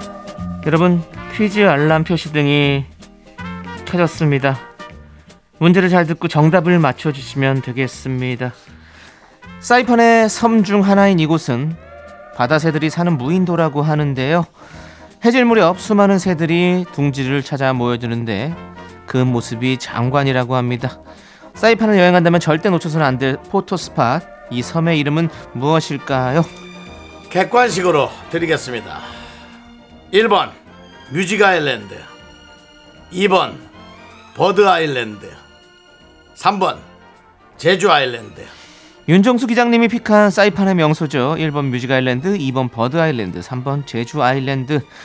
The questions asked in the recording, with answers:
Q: 사이판을 여행한다면 절대 놓쳐서는 안 될 포토스팟 이 섬의 이름은 무엇일까요?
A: 사이판의 대표 포토 스팟 새섬 조도 버드 아일랜드입니다